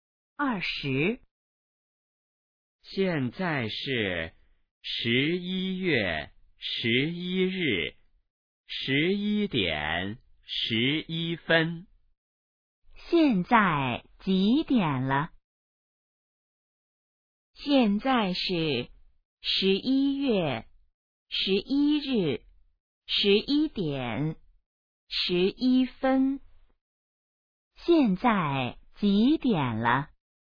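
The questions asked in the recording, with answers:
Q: 现在几点了?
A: 11:11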